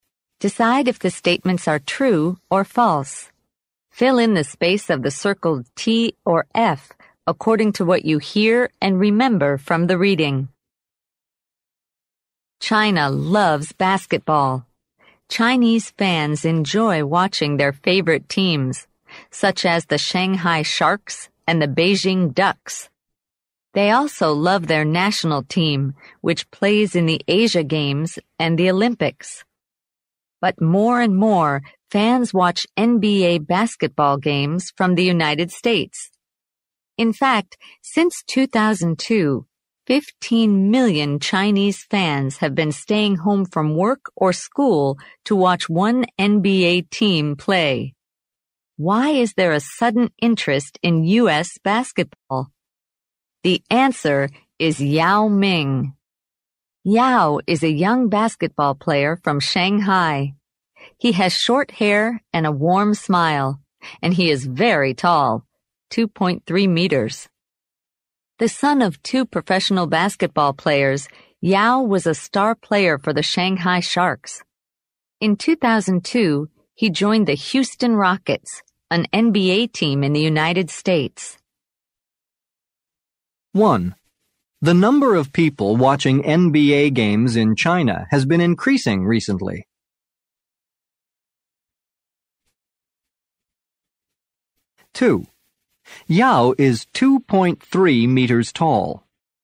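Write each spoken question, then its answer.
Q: The number of people watching NBA games in China has been increasing recently.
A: True

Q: Yao is 2.3 meters tall.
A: True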